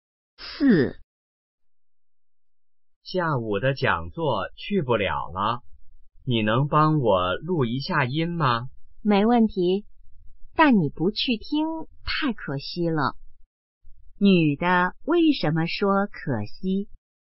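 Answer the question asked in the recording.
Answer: 因为男的不能去听讲座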